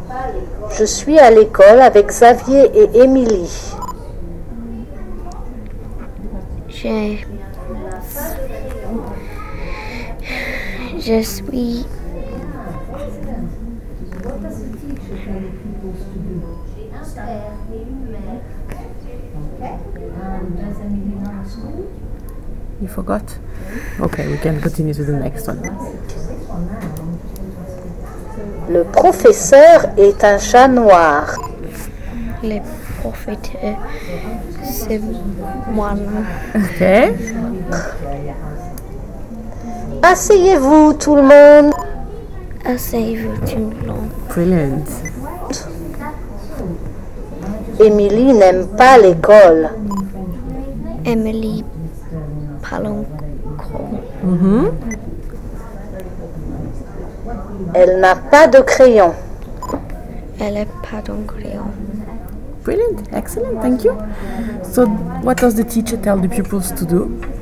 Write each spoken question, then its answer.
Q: So, what does the teacher tell the pupils to do?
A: I think it was to sit down.